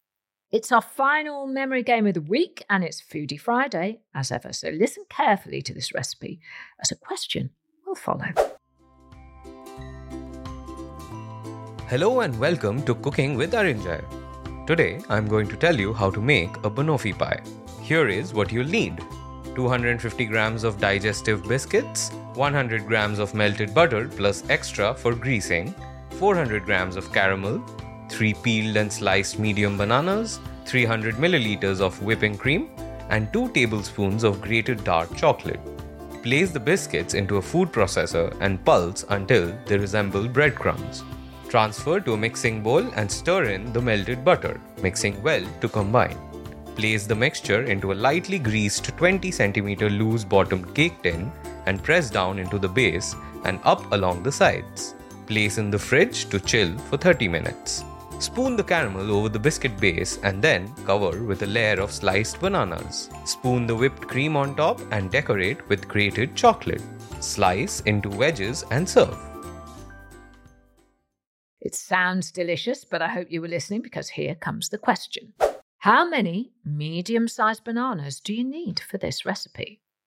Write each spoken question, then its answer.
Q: How many medium-sized bananas do you need for this recipe?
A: And the answer was three.